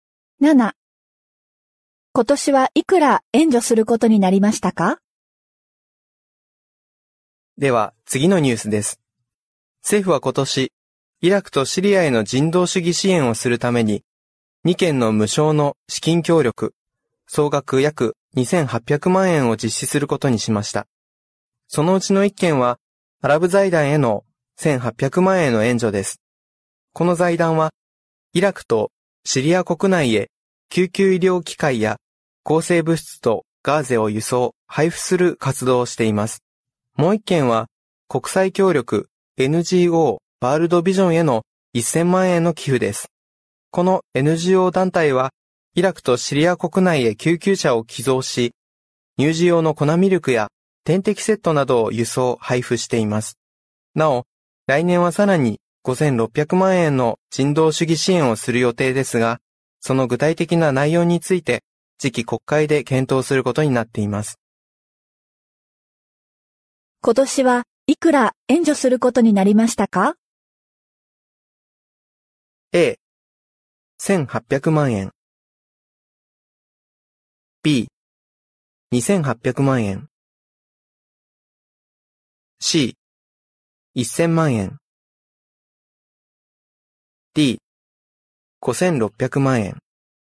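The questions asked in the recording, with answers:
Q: 今年はいくら援助することになりましたか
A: B: 2800万円。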